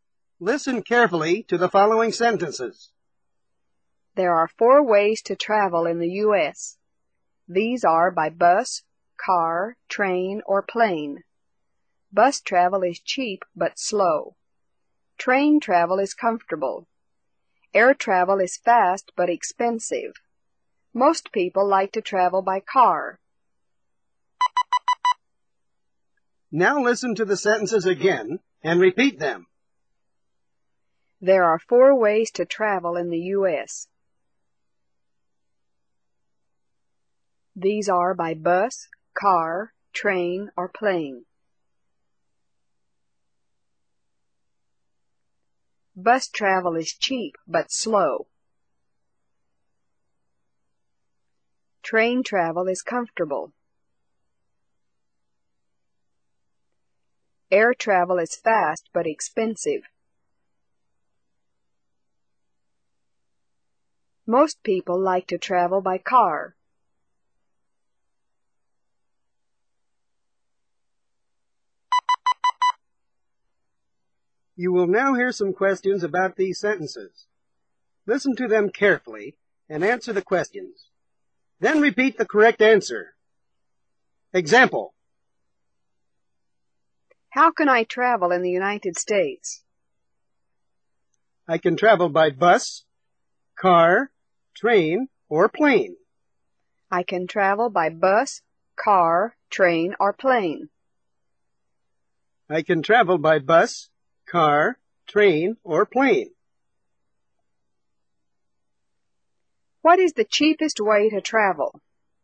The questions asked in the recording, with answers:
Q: What is the cheapest way to travel?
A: The cheapest way to travel is by bus.